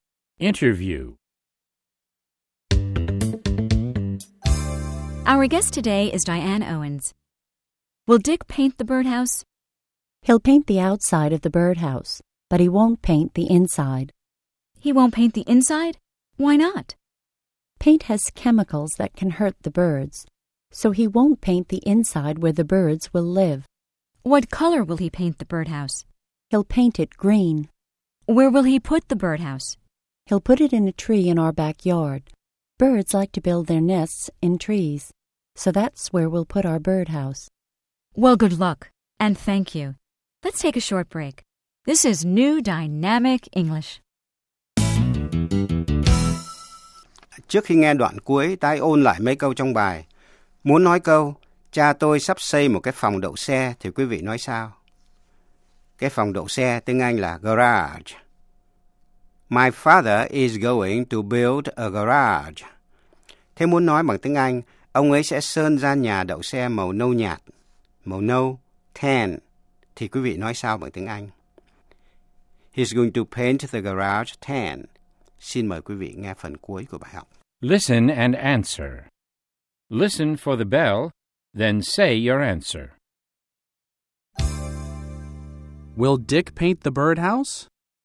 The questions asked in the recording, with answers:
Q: Will Dick paint the birdhouse?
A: He'll paint the outside, but he won't paint the inside.